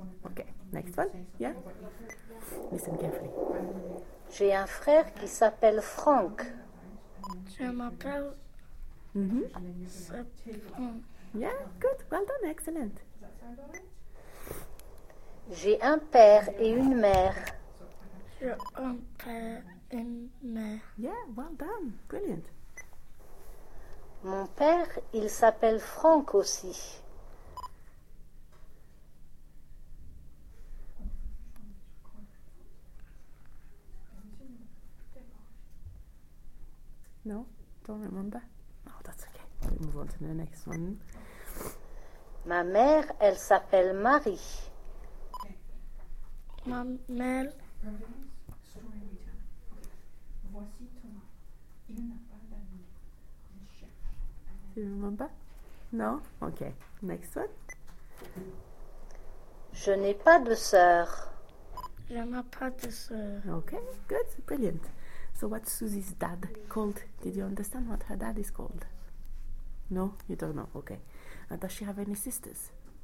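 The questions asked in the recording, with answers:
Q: So, what's Susie's dad called?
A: Franck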